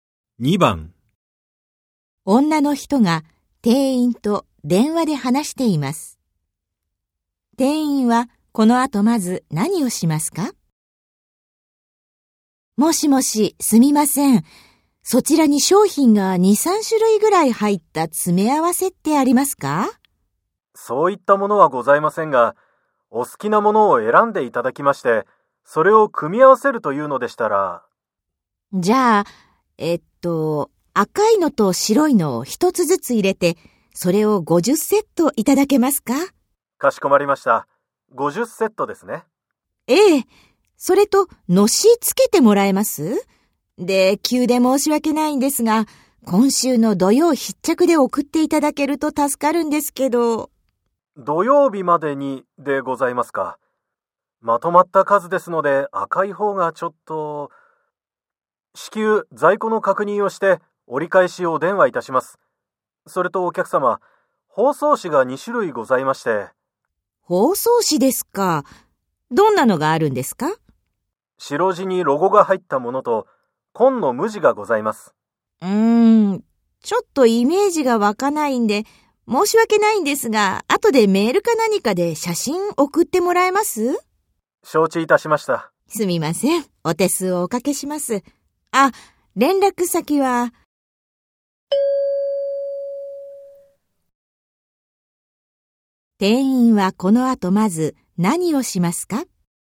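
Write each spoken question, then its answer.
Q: 店員はこの後まず何をしますか?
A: 赤い商品の在庫を確認する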